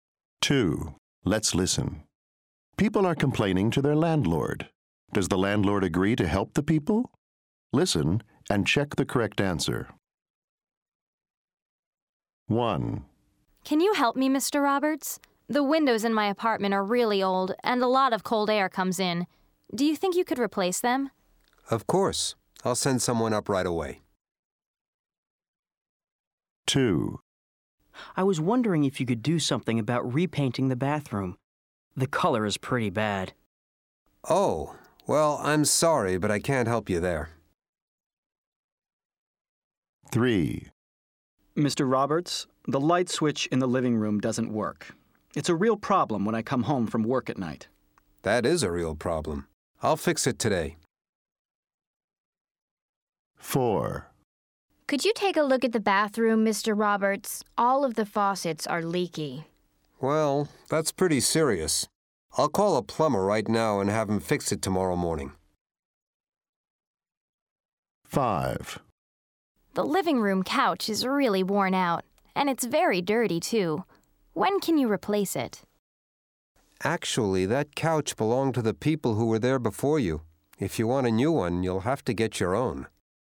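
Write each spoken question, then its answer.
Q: Does the landlord agree to help the people?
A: Yes

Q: Does the landlord agree to help the people?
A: No

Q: Does the landlord agree to help the people?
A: Yes

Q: Does the landlord agree to help the people?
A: Yes

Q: Does the landlord agree to help the people?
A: No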